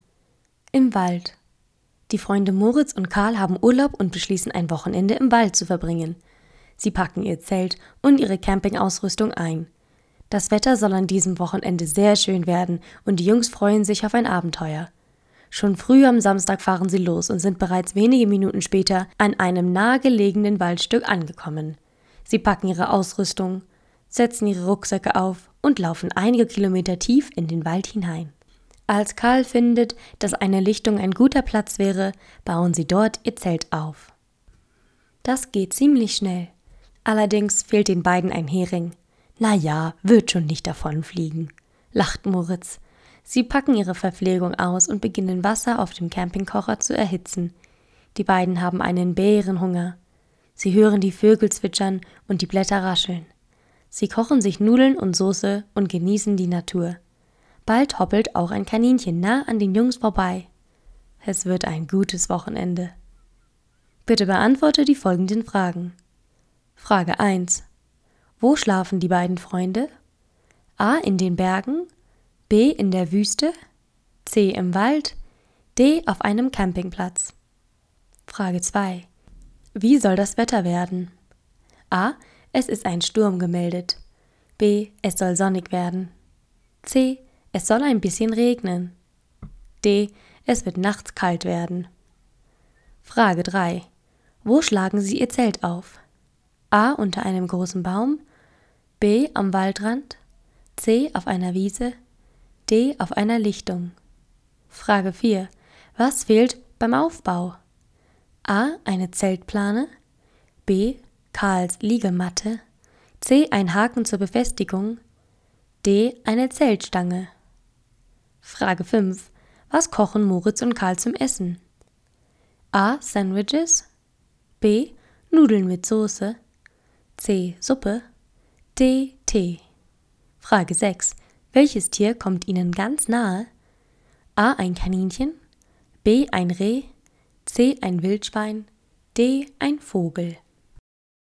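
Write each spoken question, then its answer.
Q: Wo schlafen die beiden Freunde?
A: C: Im Wald.

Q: Wie soll das Wetter werden?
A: B: Es soll sonnig werden.

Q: Wo schlagen Sie Ihr Zelt auf?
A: D: Auf einer Lichtung.

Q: Was fehlt beim Aufbau?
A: C: Ein Haken zur Befestigung.

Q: Was kochen Moritz und Karl zum Essen?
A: B: Nudeln mit Soße.

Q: Welches Tier kommt Ihnen ganz nahe?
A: A: Ein Kaninchen.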